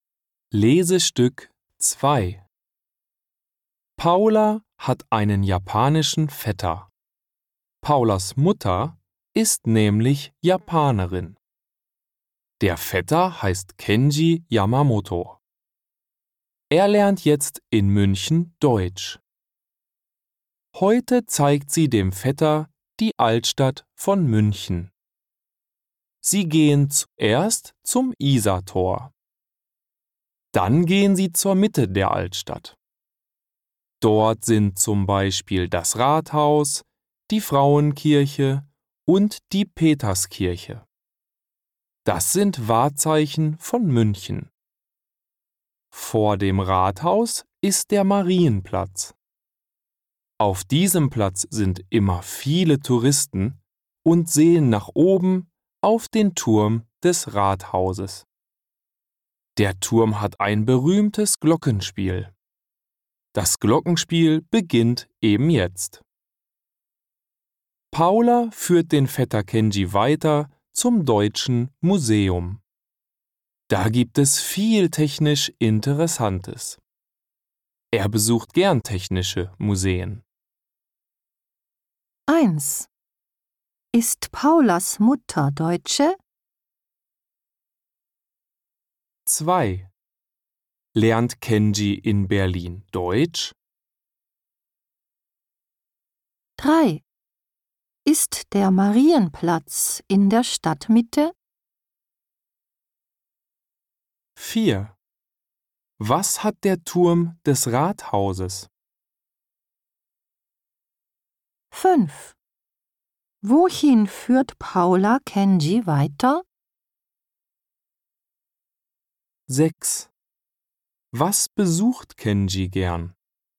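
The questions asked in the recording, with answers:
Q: Ist Paulas Mutter Deutsche?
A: Nein, sie ist Japanerin.

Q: Lernt Kenji in Berlin Deutsch?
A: Nein, er lernt in München Deutsch.

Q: Ist der Marienplatz in der Stadtmitte?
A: Ja, er ist vor dem Rathaus in der Mitte der Altstadt.

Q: Was hat der Turm des Rathauses?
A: Ein berühmtes Glockenspiel.

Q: Wohin führt Paula Kenji weiter?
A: Zum Deutschen Museum.

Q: Was besucht Kenji gern?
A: Technische Museen.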